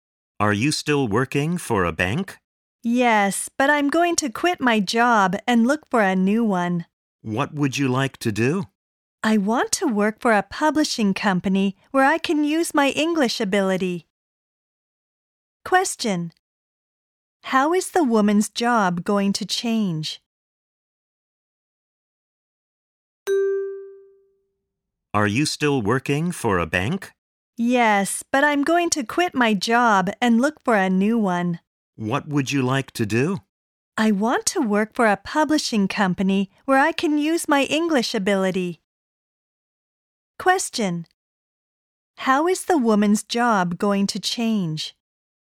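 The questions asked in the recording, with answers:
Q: How is the woman's job going to change?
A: She will quit her bank job and work for a publishing company.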